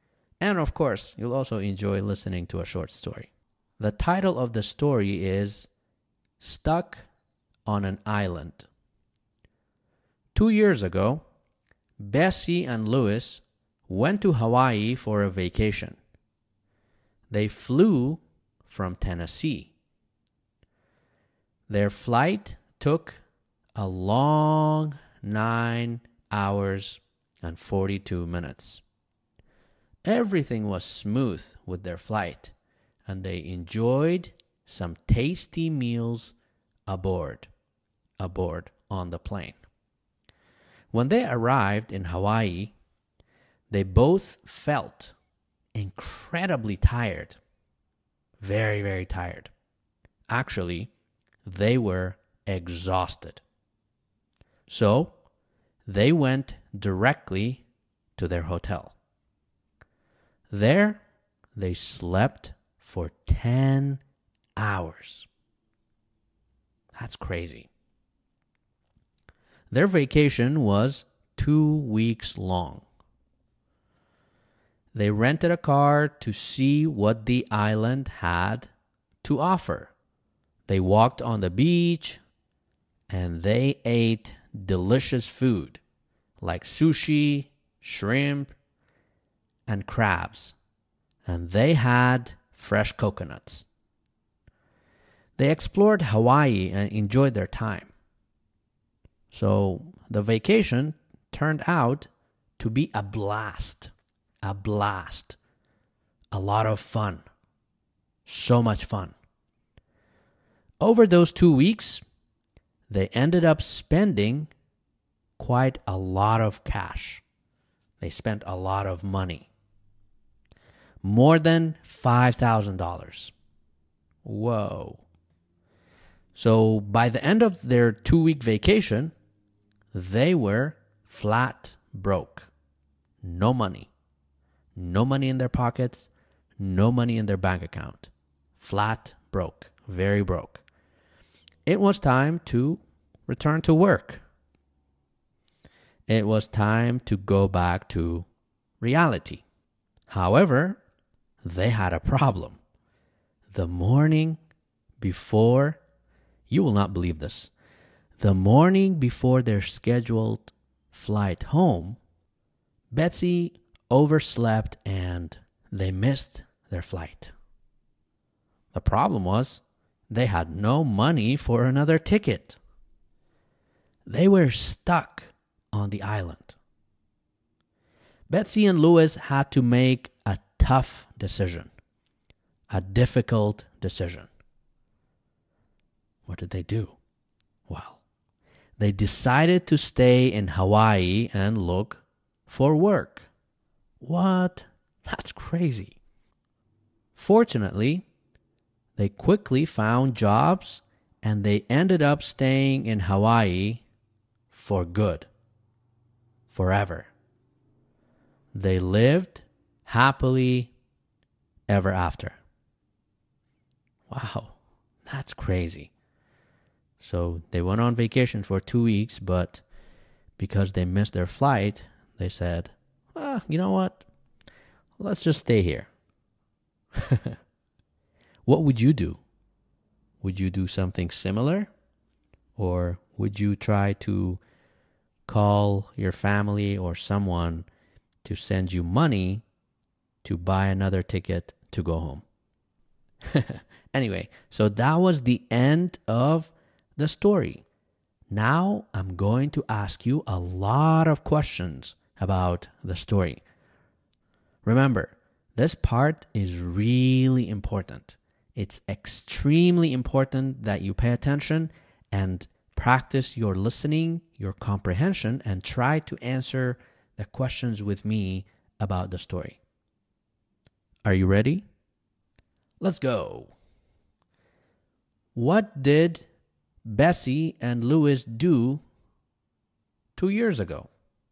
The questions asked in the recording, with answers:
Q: What did Bessie and Louis do 2 years ago?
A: They went on vacation. They went on vacation.